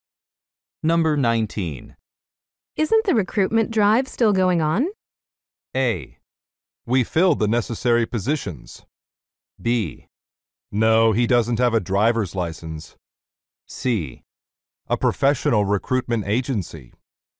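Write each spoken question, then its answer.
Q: Isn't the recruitment drive still going on?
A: A: We filled the necessary positions.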